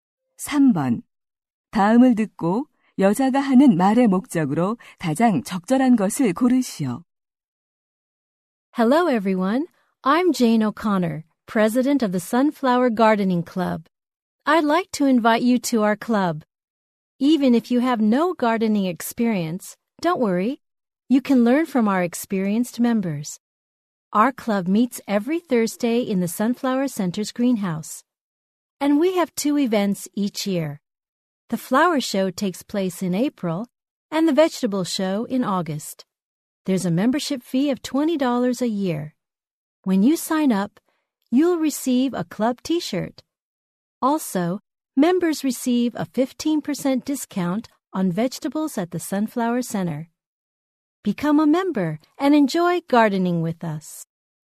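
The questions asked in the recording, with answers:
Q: 다음을 듣고 여자가 하는 말의 목적으로 가장 적절한 것을 고르시오.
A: 정원 가꾸기 동호회 가입을 권유하려고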